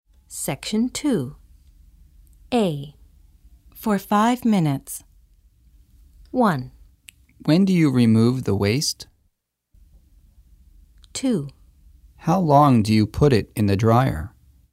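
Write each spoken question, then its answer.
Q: For 5 minutes.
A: 2: How long do you put it in the dryer?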